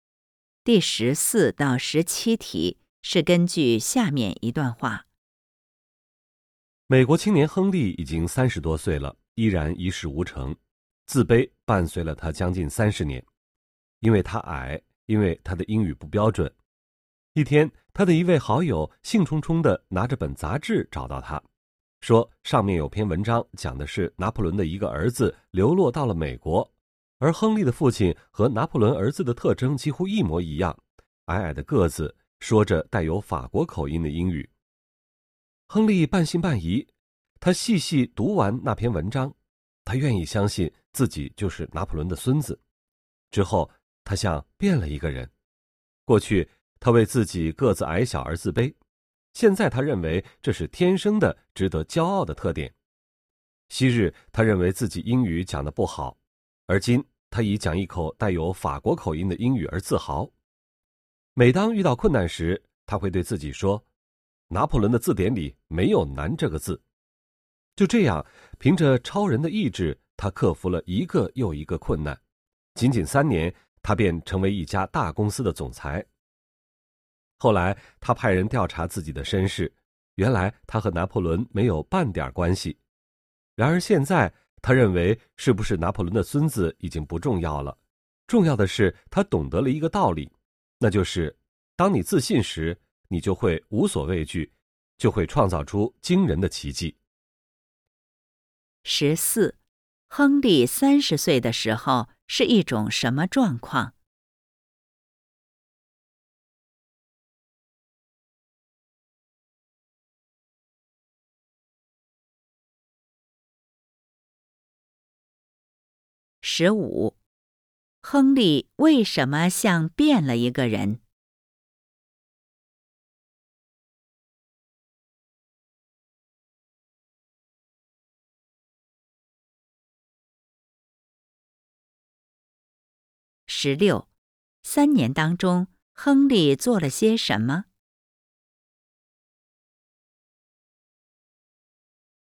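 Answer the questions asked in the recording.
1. 一事无成,很自卑
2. 他相信自己是拿破仑的孙子
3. 克服了一个又一个困难,成为一家大公司的总裁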